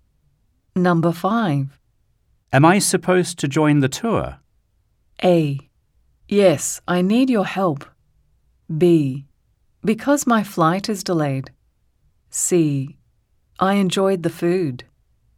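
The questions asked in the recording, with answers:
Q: Am I supposed to join the tour?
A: A: Yes, I need your help.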